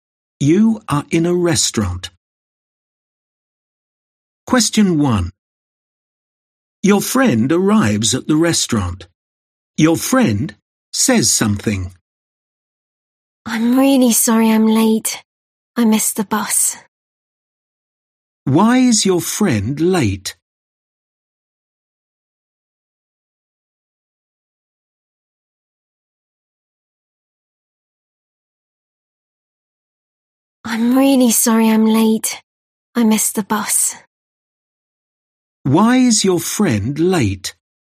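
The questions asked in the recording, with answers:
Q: Why is your friend late?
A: Missed the bus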